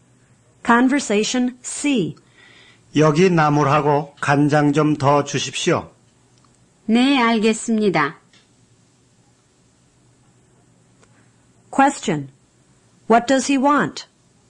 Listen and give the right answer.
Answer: He wants 나물 and soy sauce.